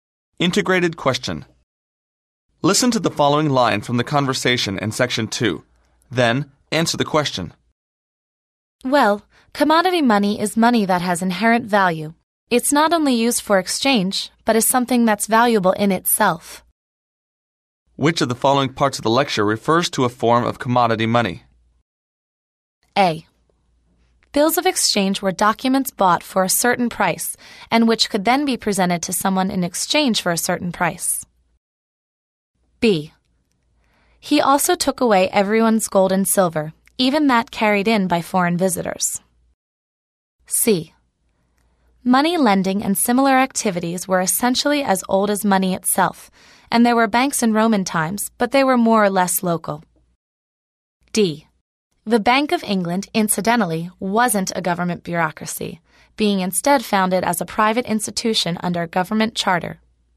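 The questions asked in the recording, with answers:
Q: Which of the following parts of the lecture refers to a form of commodity money?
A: B: He also took away everyone's gold and silver, even that carried in by foreign visitors.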